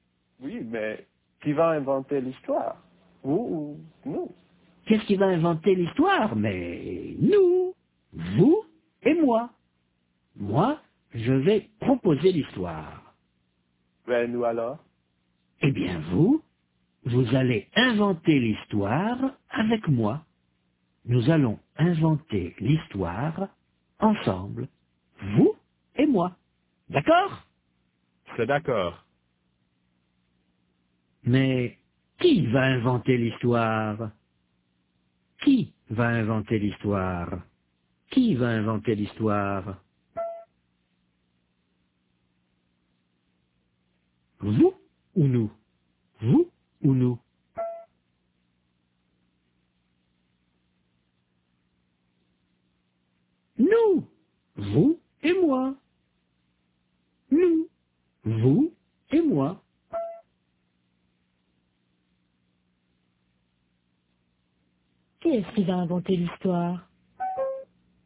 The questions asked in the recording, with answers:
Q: Qui est-ce qui va inventer l'histoire?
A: Nous.